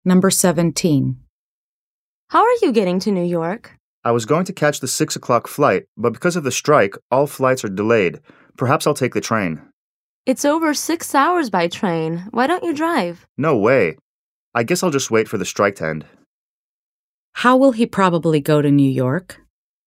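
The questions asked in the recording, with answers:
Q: How will he probably go to New York?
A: By plane, after the strike ends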